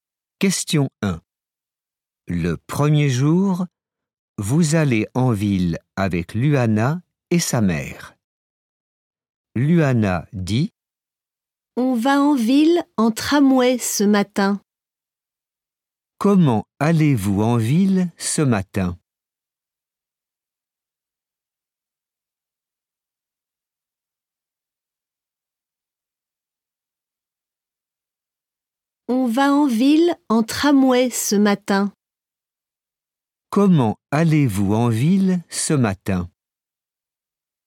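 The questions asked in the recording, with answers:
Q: Comment allez-vous en ville ce matin?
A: En tramway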